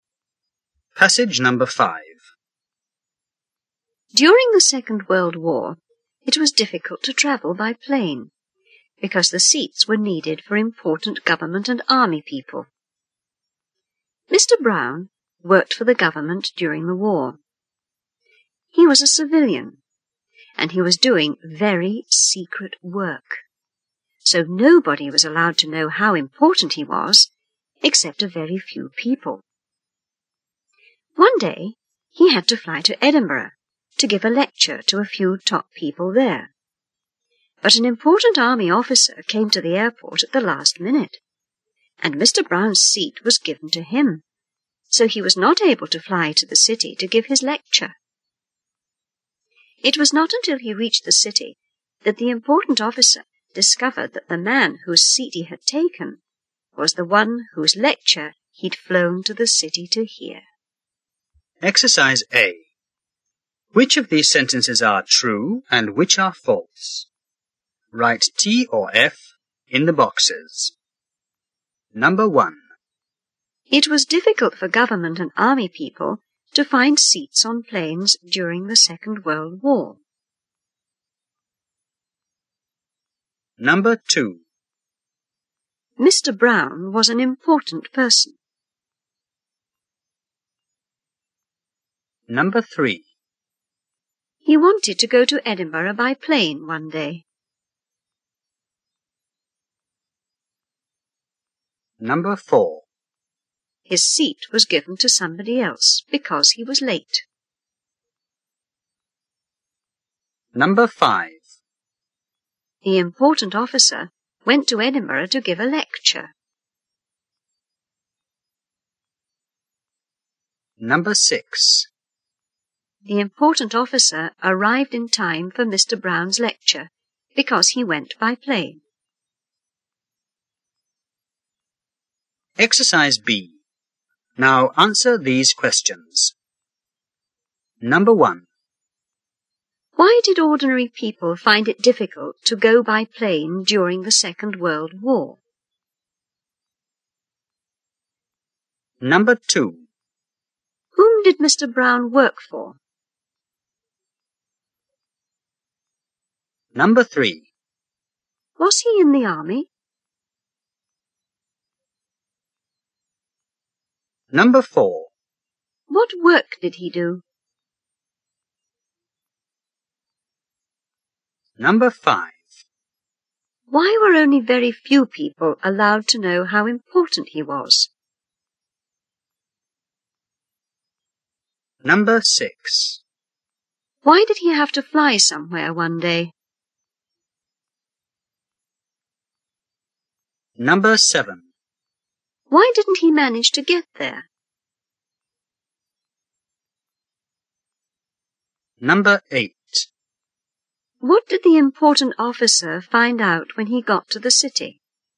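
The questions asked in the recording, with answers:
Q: It was difficult for government and army people to find seats on planes during the Second World War.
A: False

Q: Mr. Brown was an important person.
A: True

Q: He wanted to go to Edinburgh by plane one day.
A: True

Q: His seat was given to somebody else because he was late.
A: False

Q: The important officer went to Edinburgh to give a lecture.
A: False

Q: Why did ordinary people find it difficult to go by plane during the Second World War?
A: Because the seats were needed for important government and army people.

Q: Whom did Mr. Brown work for?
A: The government.

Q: Was he in the army?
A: No, he was a civilian.

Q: What work did he do?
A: Very secret work.

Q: Why were only very few people allowed to know how important he was?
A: Because his work was very secret.

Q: Why did he have to fly somewhere one day?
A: To give a lecture to a few top people in Edinburgh.

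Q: Why didn't he manage to get there?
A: His seat was given to an important army officer who came at the last minute.

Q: What did the important officer find out when he got to the city?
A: That the man whose seat he had taken was the one whose lecture he had come to hear.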